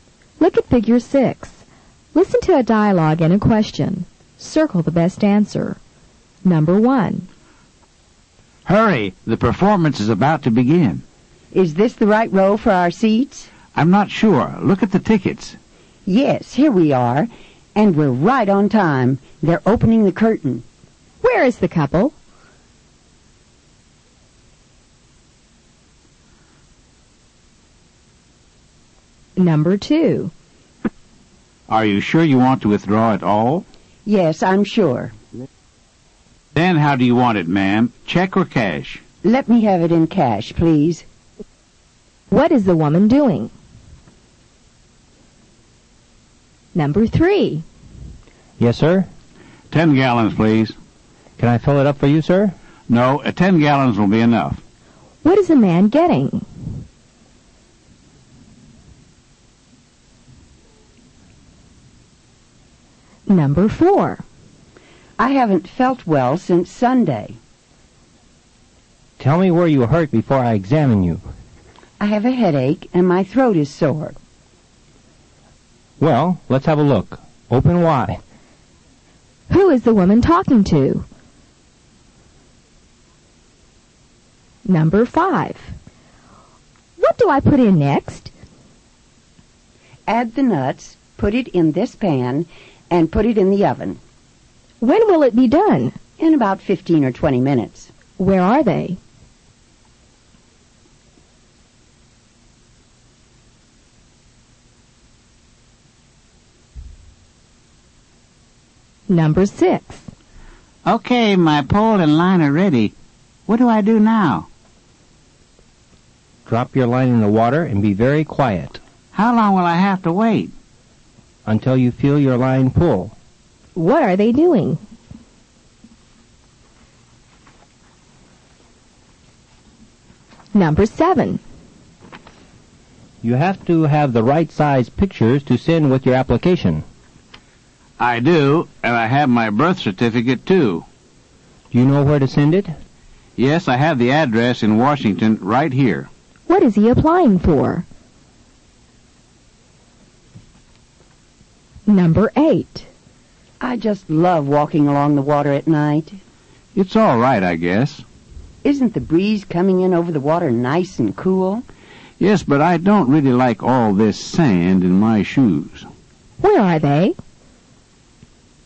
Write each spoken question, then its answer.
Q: Where is the couple?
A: Number 1 is A. The couple is at the theater.

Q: What is the man getting?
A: Number 3 is C. The man is getting gasoline.

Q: Who is the woman talking to?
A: Number 4 is A. The woman is talking to a doctor.

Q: Where are they?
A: Number 5 is B. They are in a kitchen.

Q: What are they doing?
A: Number 6 is B. They are fishing.

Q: What is he applying for?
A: Number 7 is A. He is applying for a passport.

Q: Where are they?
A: Number 8 is B. They are at the beach.